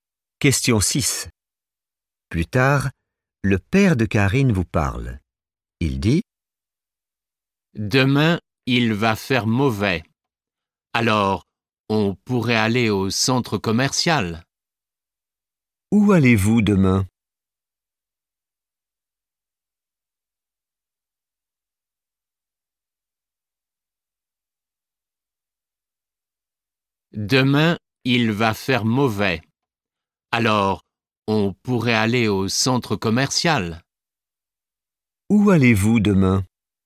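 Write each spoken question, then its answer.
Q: Où allez-vous demain?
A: au centre commercial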